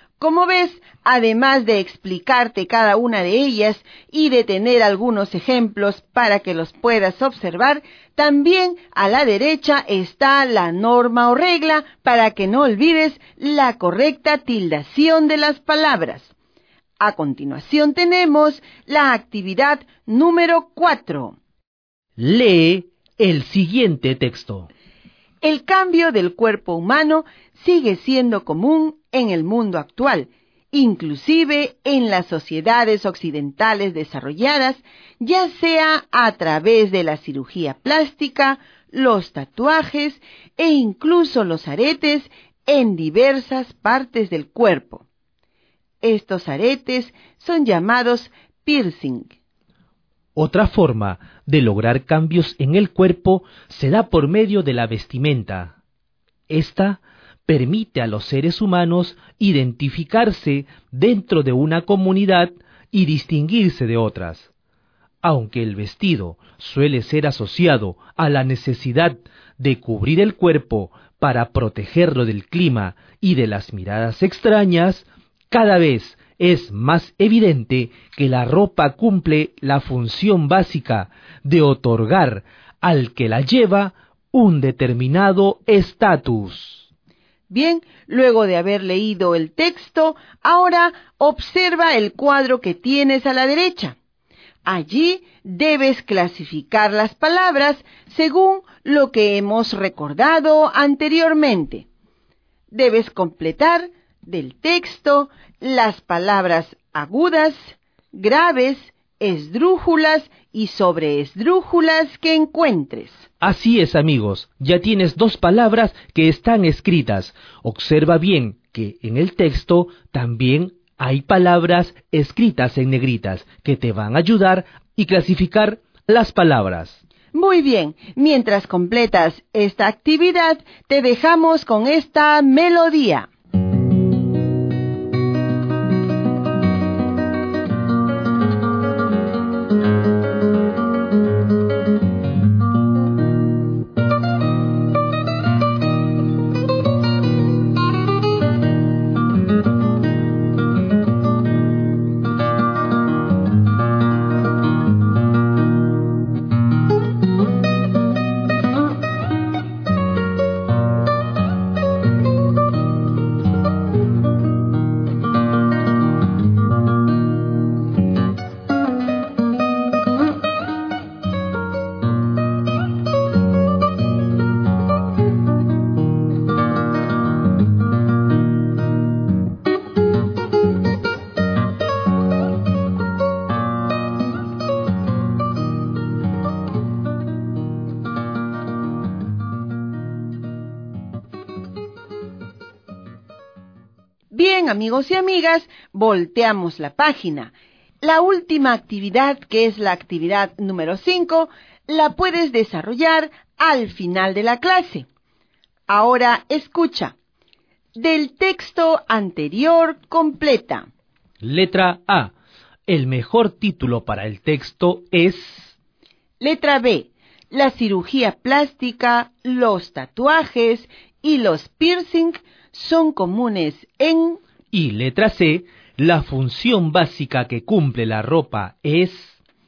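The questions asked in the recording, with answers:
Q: La cirugía plástica, los tatuajes y los piercing son comunes en...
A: el mundo actual, inclusive en las sociedades occidentales desarrolladas

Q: La función básica que cumple la ropa es...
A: otorgar al que la lleva un determinado estatus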